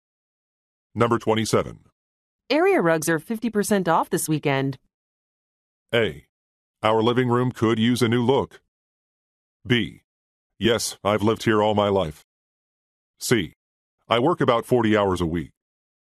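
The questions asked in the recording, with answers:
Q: Area rugs are 50% off this weekend.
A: A: Our living room could use a new look.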